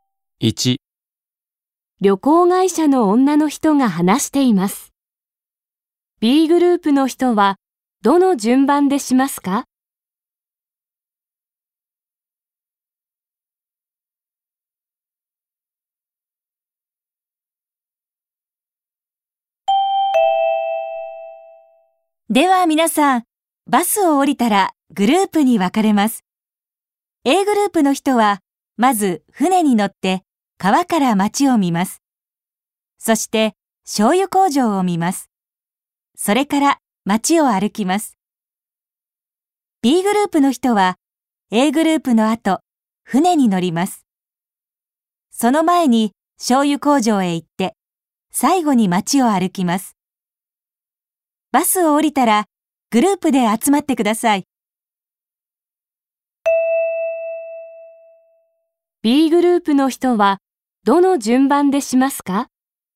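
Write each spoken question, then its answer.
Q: B グループの人はどの順番でしますか?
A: 醤油工場を見る→船に乗る→町を歩く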